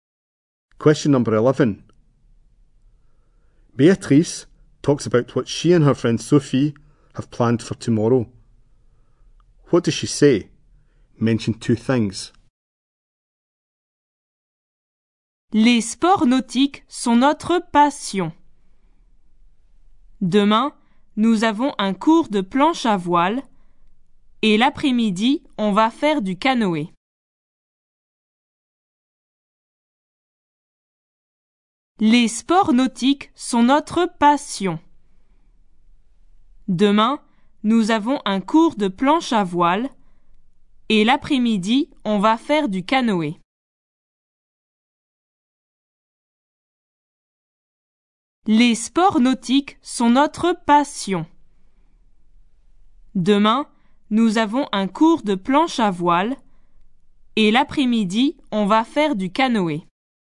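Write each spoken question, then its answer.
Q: What does she say? Mention two things.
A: A windsurfing lesson tomorrow and canoeing in the afternoon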